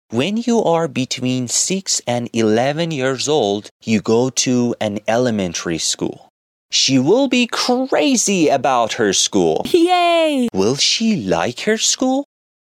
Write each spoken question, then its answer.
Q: Will she like her school?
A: Yes, she will be crazy about her school.